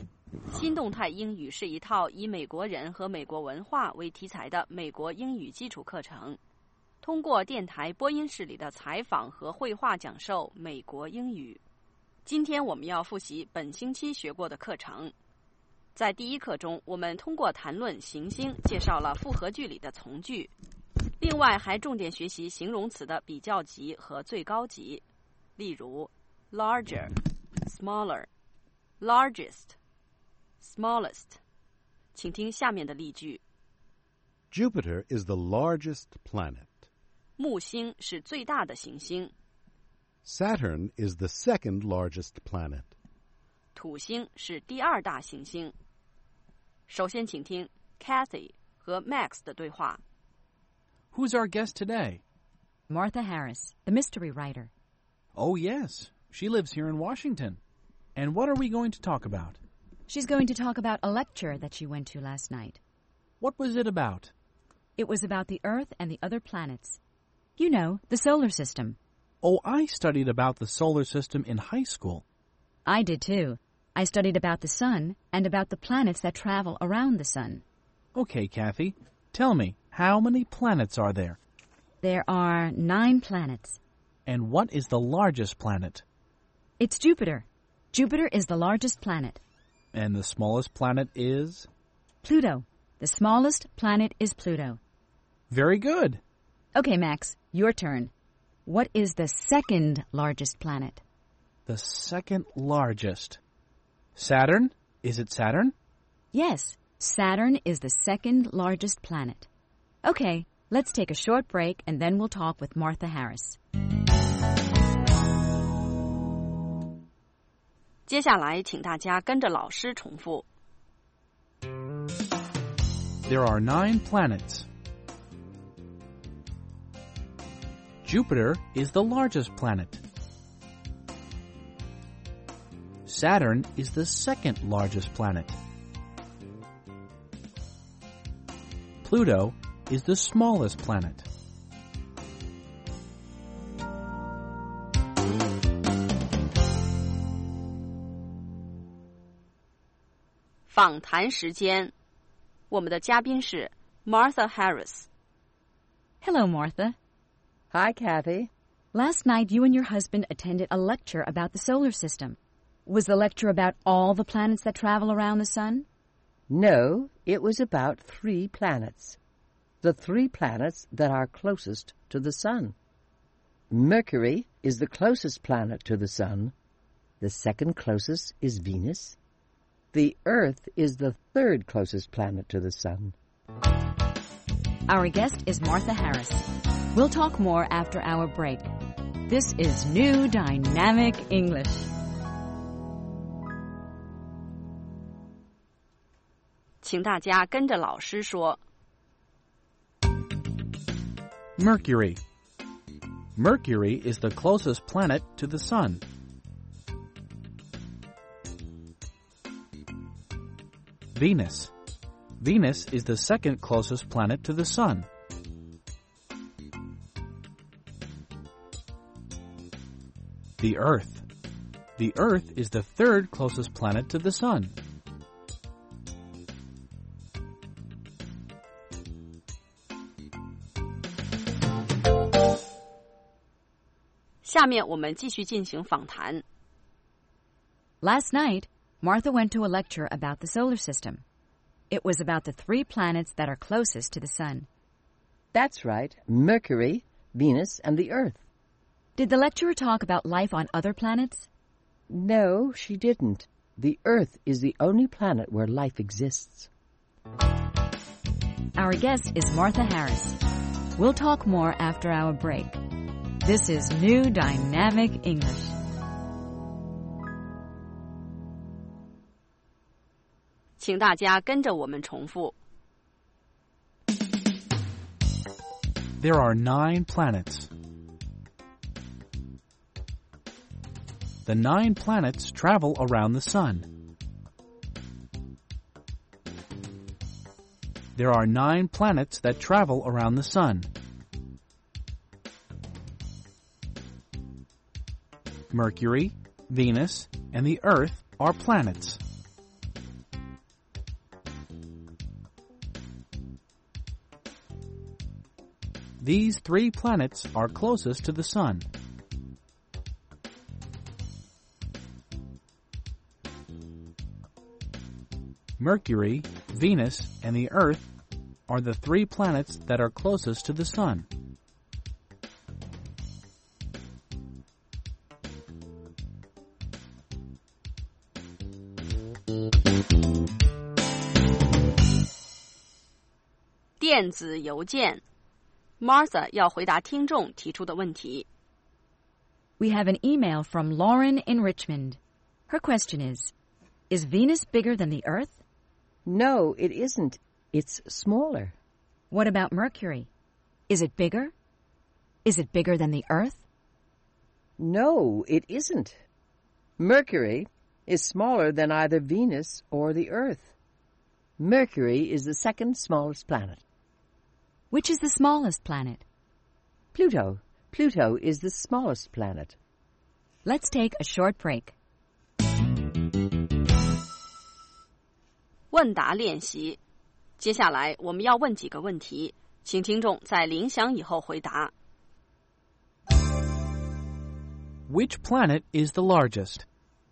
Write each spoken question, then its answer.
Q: Which planet is the largest?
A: Jupiter is the largest planet.